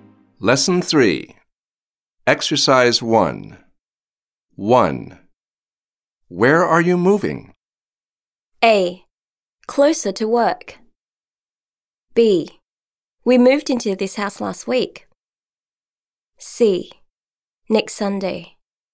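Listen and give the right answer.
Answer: A: Closer to work.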